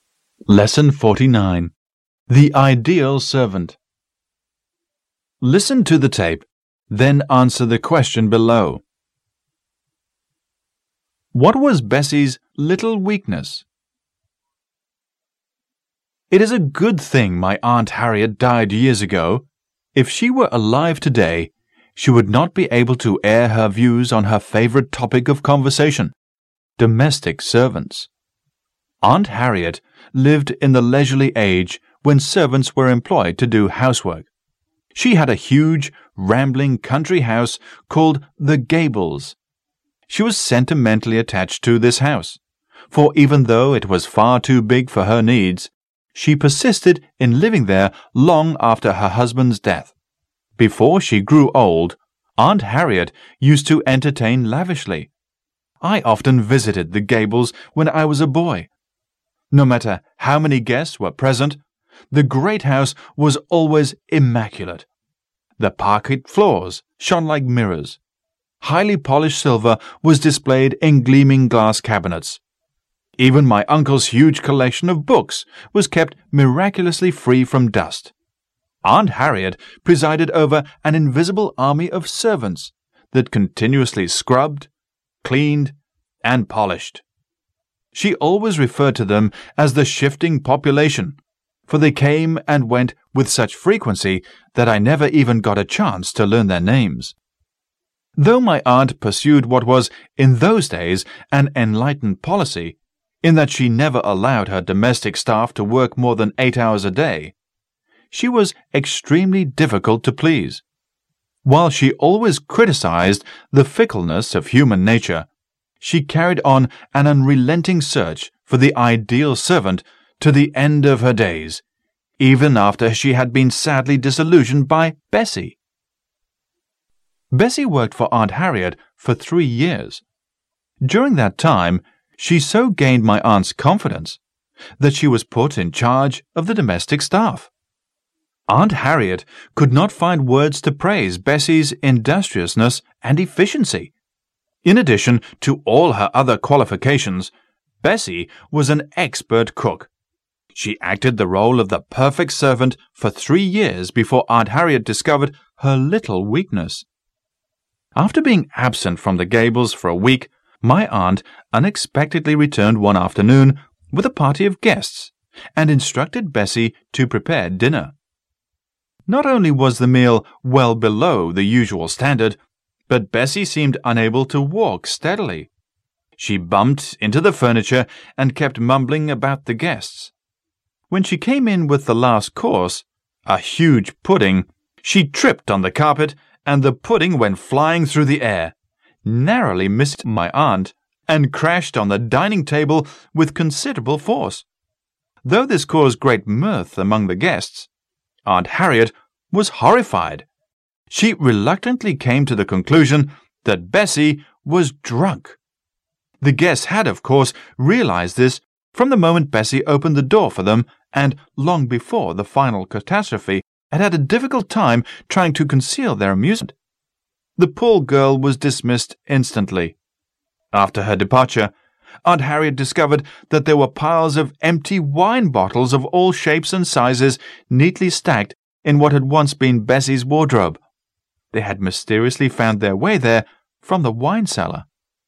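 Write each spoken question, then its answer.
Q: What was Bessie's little weakness?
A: She drank too much (she secretly drank wine from the cellar).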